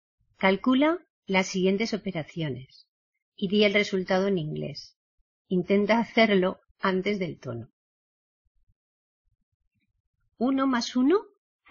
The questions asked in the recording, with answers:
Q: ¿Uno más uno?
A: Two.